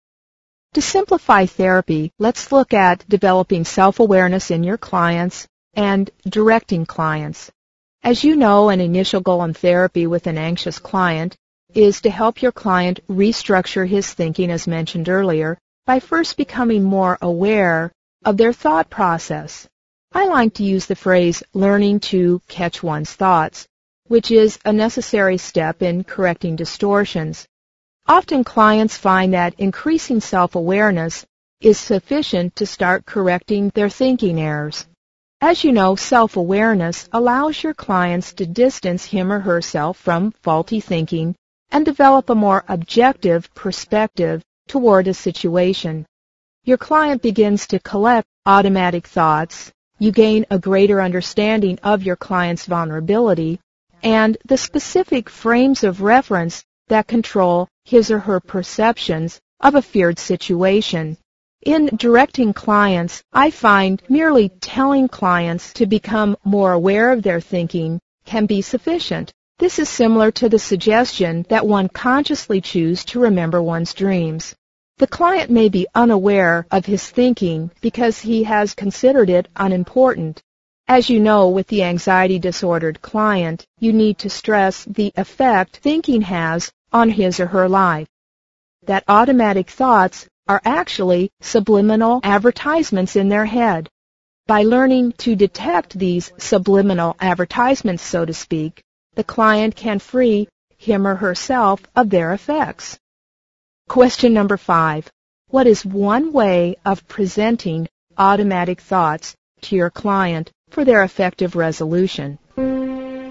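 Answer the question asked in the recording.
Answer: Present them as subliminal advertisements in the client's head, which the client can learn to detect and so free himself or herself of their effects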